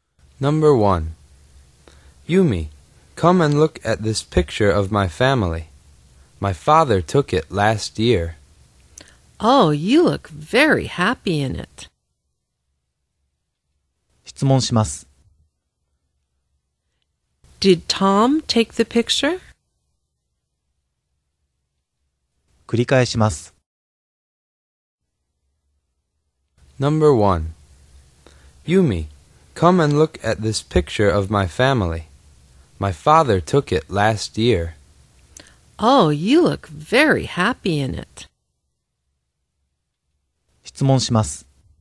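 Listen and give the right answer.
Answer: No, he didn't. His father took it.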